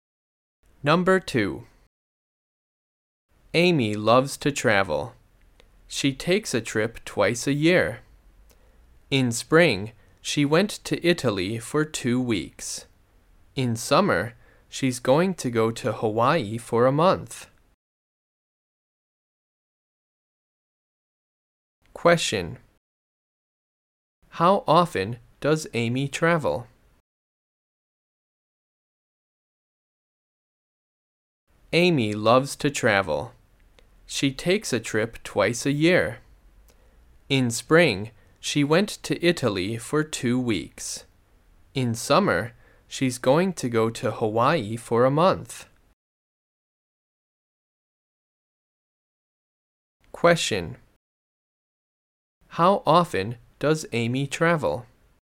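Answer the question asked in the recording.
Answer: Twice a year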